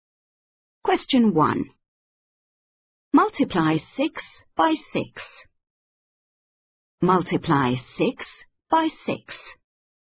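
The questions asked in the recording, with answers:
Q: Multiply 6 by 6.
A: 36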